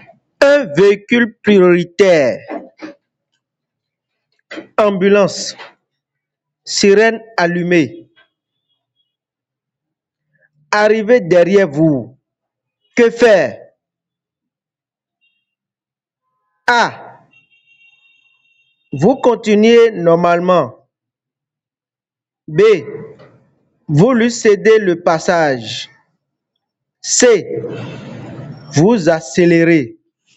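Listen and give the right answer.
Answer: B: Vous lui cédez le passage.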